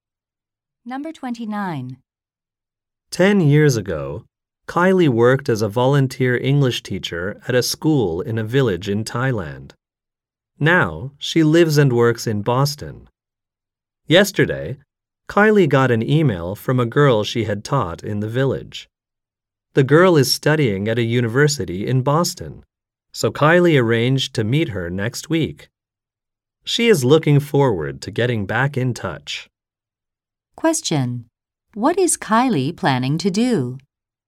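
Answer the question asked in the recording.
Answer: Meet a former student from Thailand in Boston.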